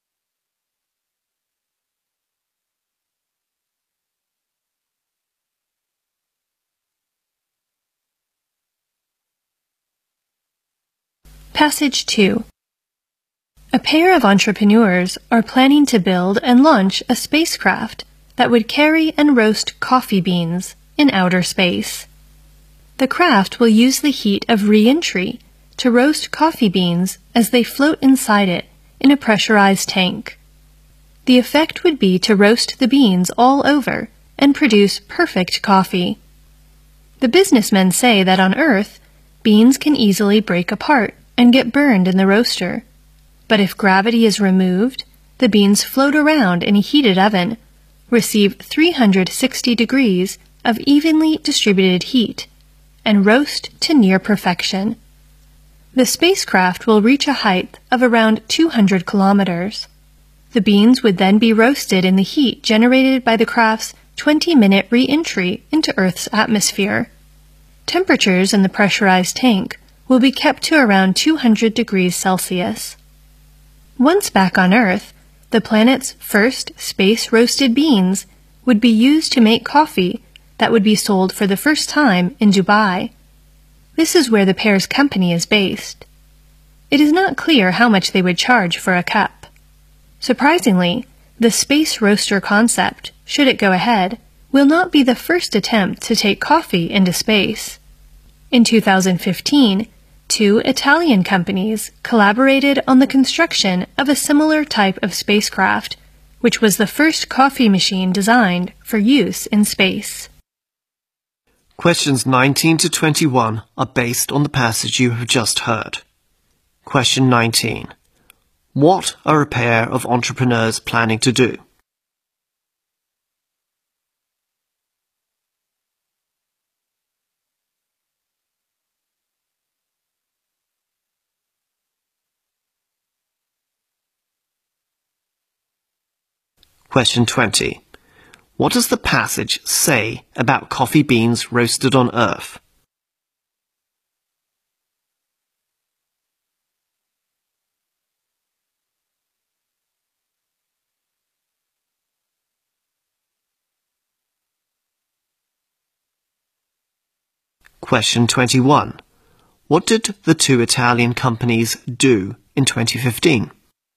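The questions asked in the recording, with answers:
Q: What are a pair of entrepreneurs planning to do?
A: Build and launch a spacecraft to roast coffee beans in space

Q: What does the passage say about coffee beans roasted on Earth?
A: They can easily break apart and get burned

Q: What did the two Italian companies do in 2015?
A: Built the first coffee machine designed for use in space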